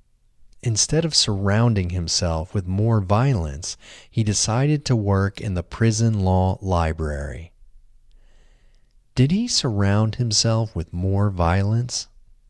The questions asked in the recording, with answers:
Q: Did he surround himself with more violence?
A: No, he didn't surround himself with more violence.